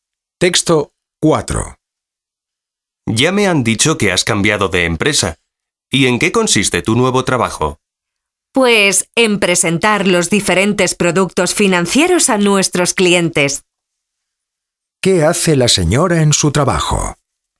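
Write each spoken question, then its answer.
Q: ¿Qué hace la señora en su trabajo?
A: Presenta productos financieros a los clientes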